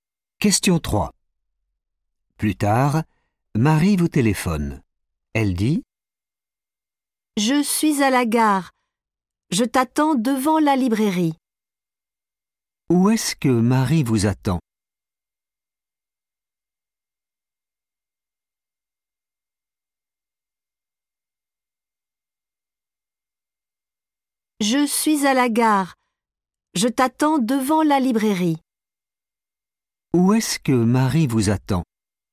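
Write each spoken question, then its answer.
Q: Où est-ce que Marie vous attend ?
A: devant la librairie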